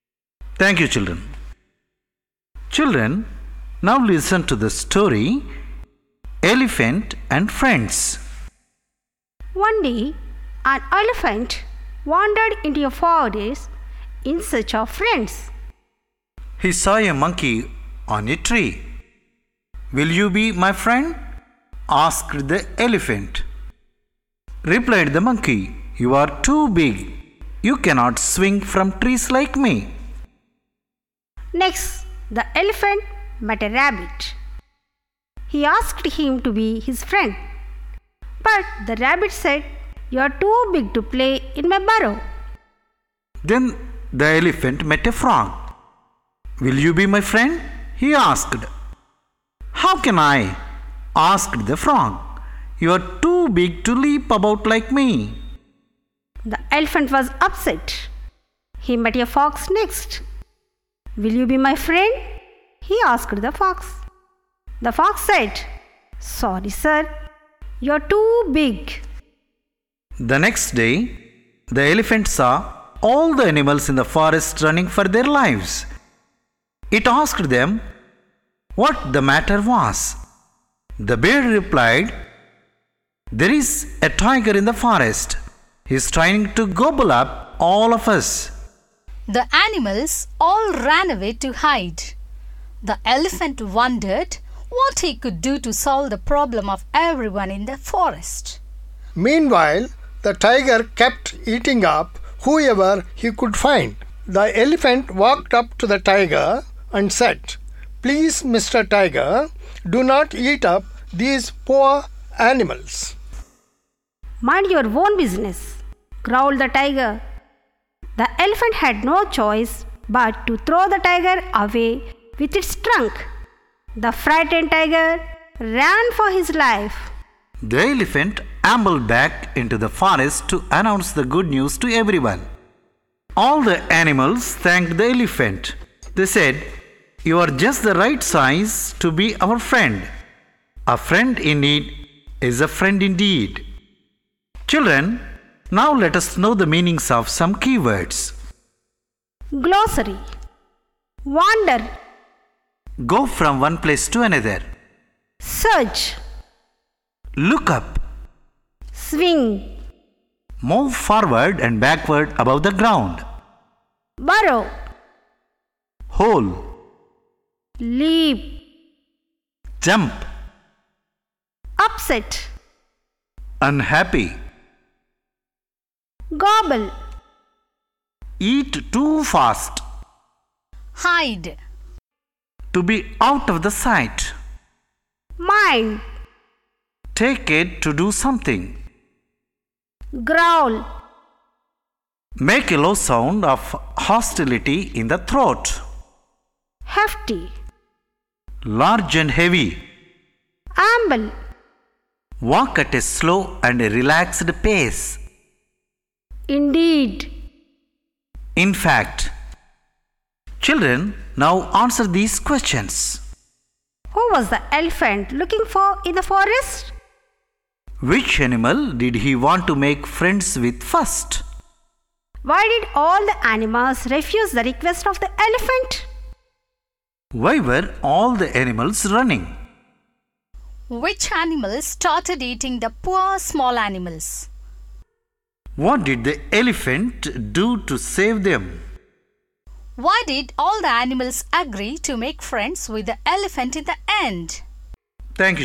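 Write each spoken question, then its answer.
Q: Who was the elephant looking for in the forest?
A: Friends

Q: Which animal did he want to make friends with first?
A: A monkey

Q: Why did all the animals refuse the request of the elephant?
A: Because he was too big

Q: Why were all the animals running?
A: A tiger was trying to eat them all

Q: Which animals started eating the poor small animals?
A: The tiger

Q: What did the elephant do to save them?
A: He threw the tiger away with his trunk

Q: Why did all the animals agree to make friends with the elephant in the end?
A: Because he saved them from the tiger; a friend in need is a friend indeed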